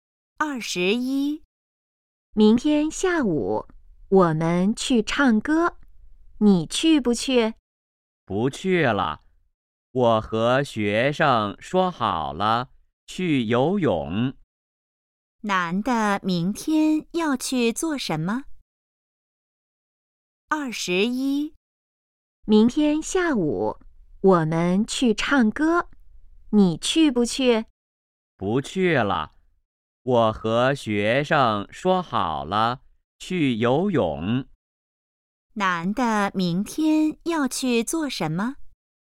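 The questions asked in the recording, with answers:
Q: 男的明天要去做什么?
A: 去游泳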